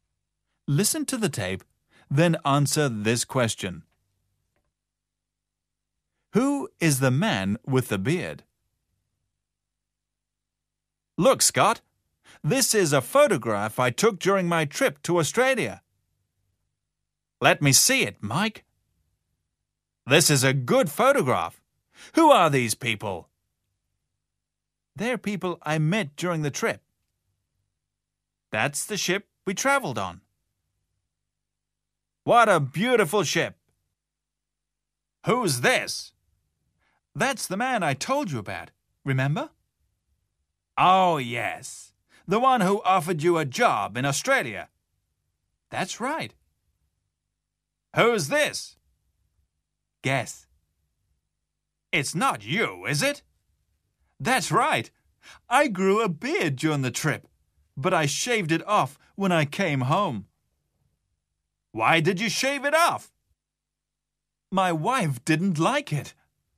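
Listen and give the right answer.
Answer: Mike (the speaker himself)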